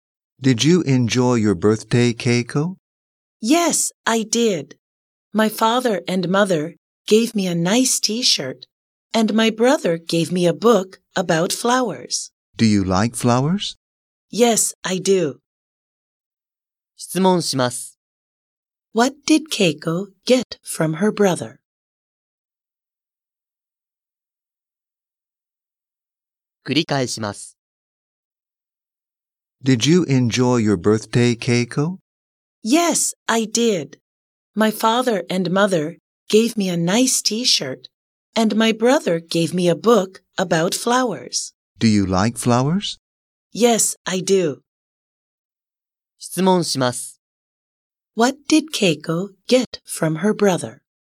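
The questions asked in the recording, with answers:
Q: What did Keiko get from her brother?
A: A book about flowers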